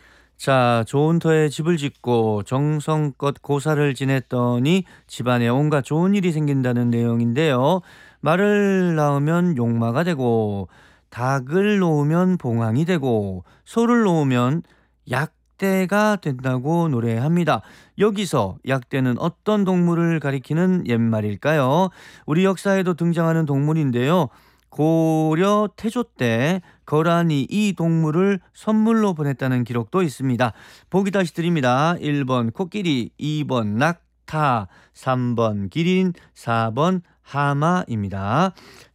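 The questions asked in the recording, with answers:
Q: 여기서 약대는 어떤 동물을 가리키는 옛말일까요?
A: 2: 낙타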